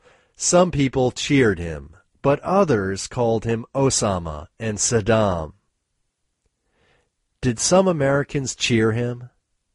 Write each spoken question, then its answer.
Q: Did some Americans cheer him?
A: Yes, some Americans cheered him.